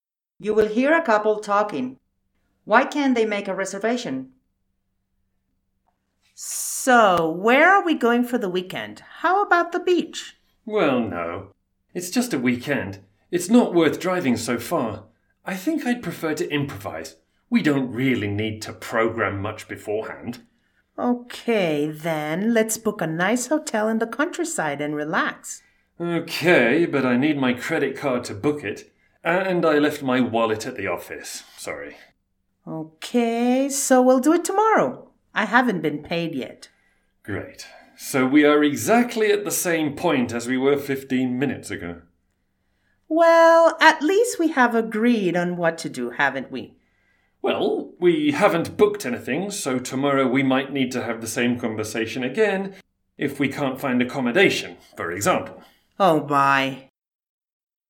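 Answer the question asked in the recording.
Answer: The credit card is needed and the wallet was left at the office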